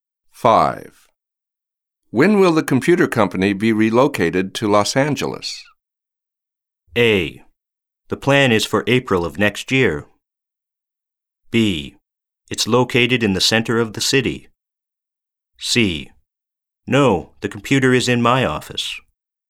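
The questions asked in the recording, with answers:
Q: When will the computer company be relocated to Los Angeles?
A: A: The plan is for April of next year.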